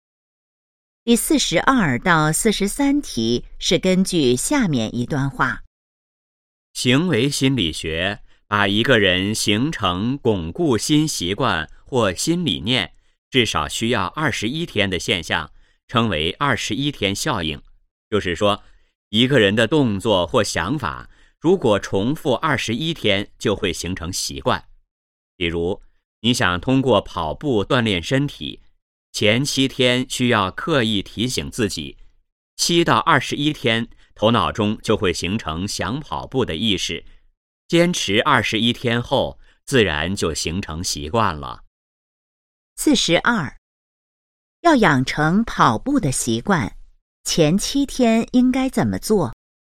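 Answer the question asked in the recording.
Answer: 刻意提醒自己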